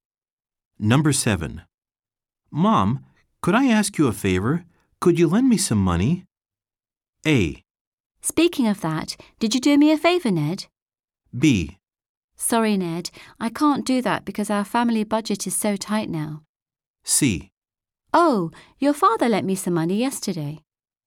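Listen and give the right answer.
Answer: B: Sorry, Ned, I can't do that because our family budget is so tight now.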